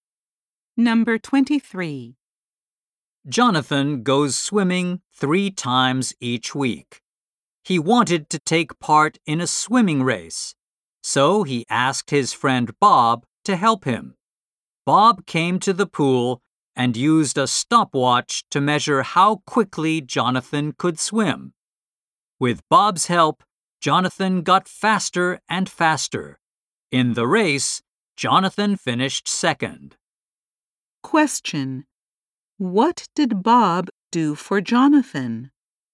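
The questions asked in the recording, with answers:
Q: What did Bob do for Jonathan?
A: He timed Jonathan's swimming with a stopwatch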